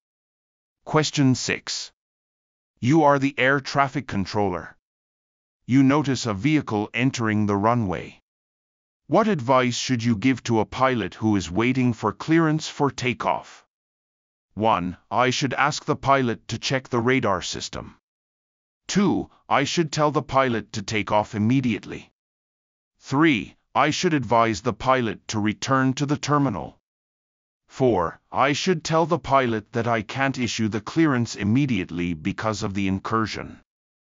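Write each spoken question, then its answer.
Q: What advice should you give to a pilot who is waiting for clearance for takeoff?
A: 4: I should tell the pilot that I can't issue the clearance immediately because of the incursion.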